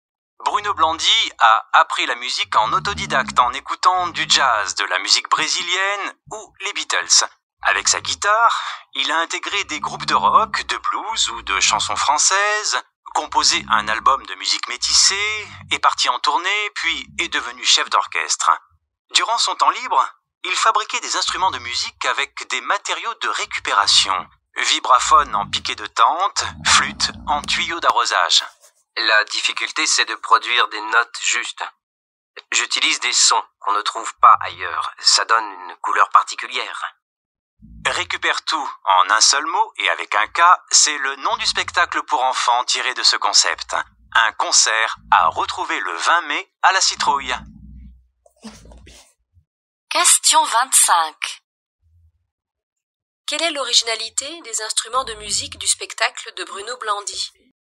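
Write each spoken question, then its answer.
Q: Quelle est l'originalité des instruments de musique du spectacle de Bruno Blandy ?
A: Ils sont fabriqués avec des matériaux de récupération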